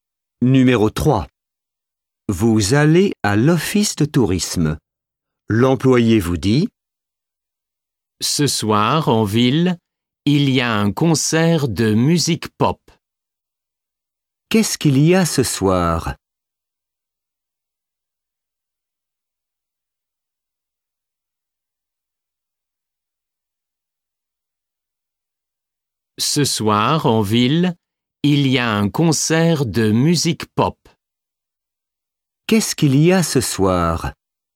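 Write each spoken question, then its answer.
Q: Qu'est-ce qu'il y a ce soir?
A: Un concert de musique pop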